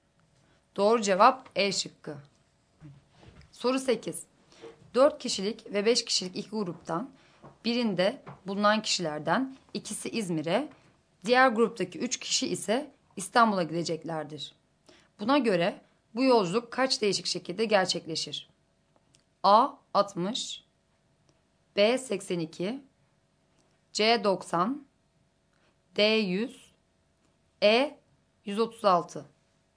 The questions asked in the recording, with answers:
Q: Buna göre bu yolculuk kaç değişik şekilde gerçekleşir?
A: Doğru cevap D şıkkı.